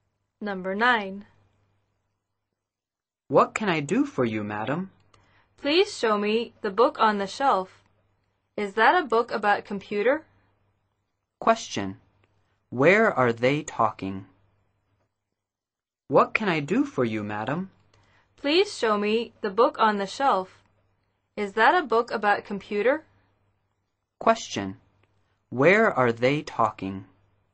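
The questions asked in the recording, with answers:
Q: Question.Where are they talking?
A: In a bookstore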